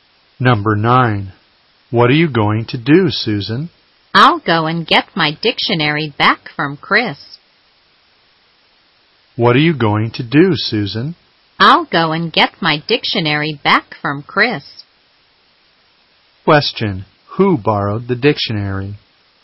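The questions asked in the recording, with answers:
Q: Who borrowed the dictionary?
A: Chris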